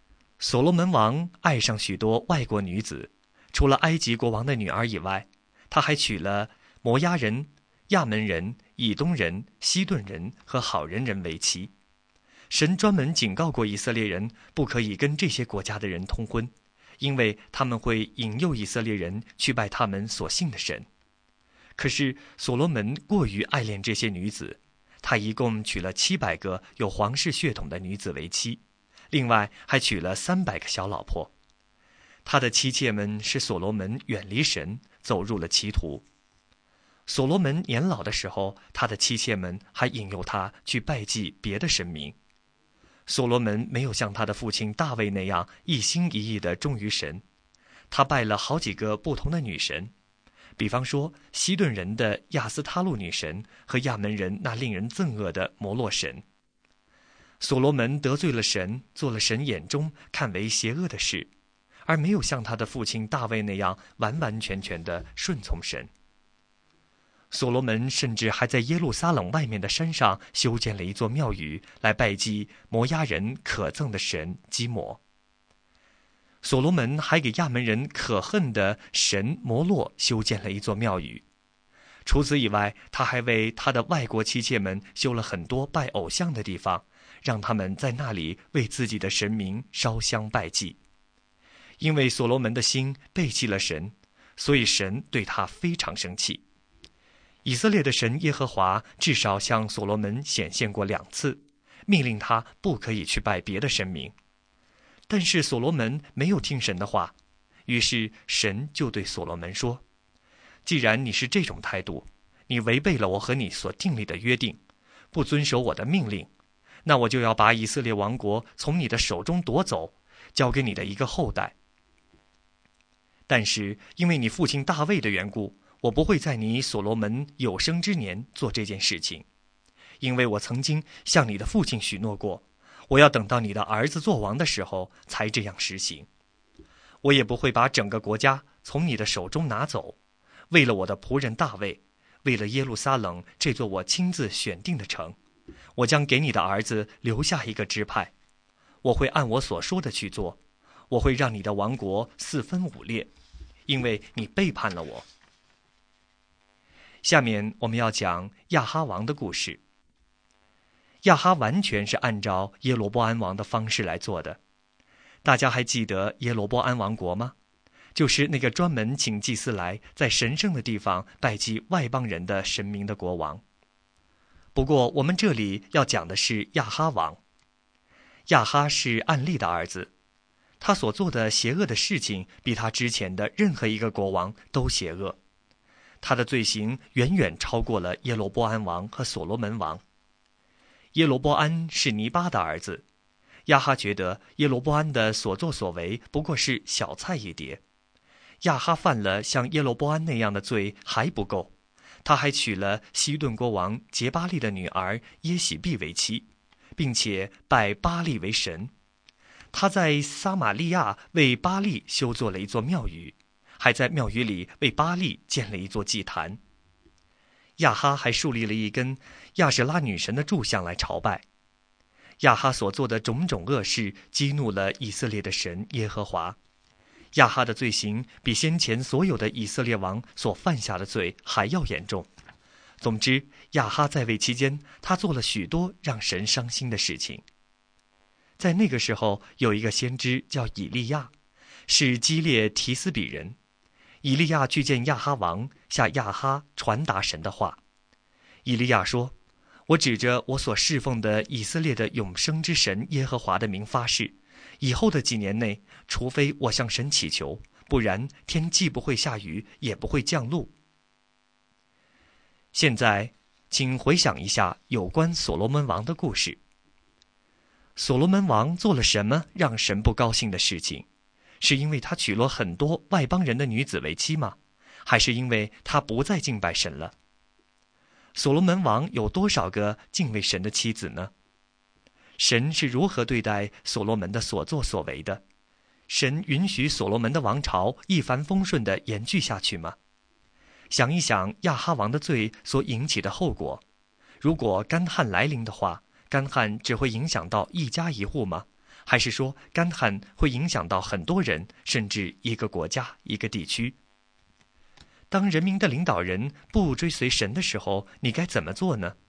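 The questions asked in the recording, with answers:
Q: 所罗门王做了什么让神不高兴的事情?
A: 他娶了很多外邦女子为妻,并拜祭别的神明

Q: 神允许所罗门的王朝一帆风顺地延续下去吗?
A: 不允许,神要让王国四分五裂,只给他儿子留下一个支派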